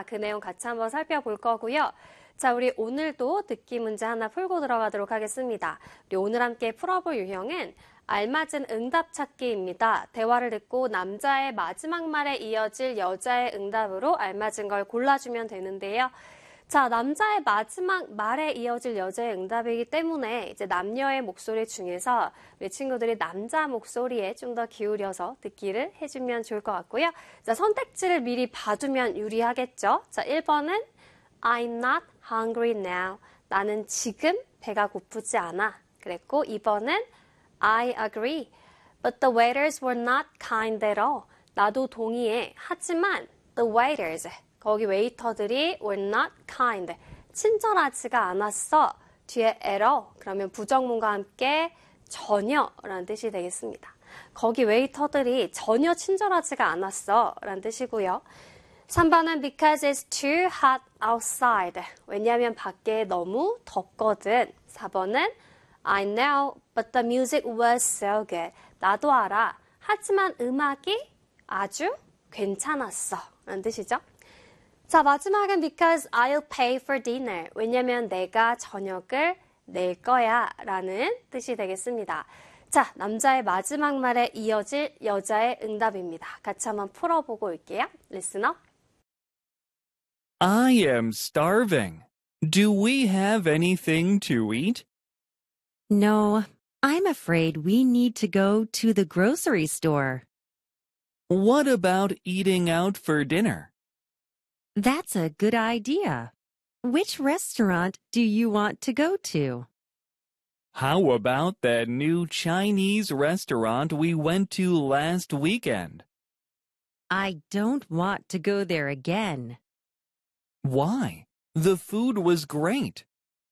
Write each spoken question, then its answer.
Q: 대화를 듣고 남자의 마지막 말에 이어질 여자의 응답으로 알맞은 걸 골라주면 되는데요.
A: 정답은 2번이 되겠습니다.